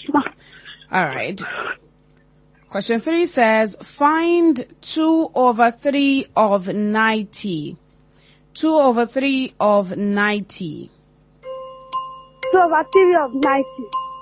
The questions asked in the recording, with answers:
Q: find 2/3 of 90.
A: 60.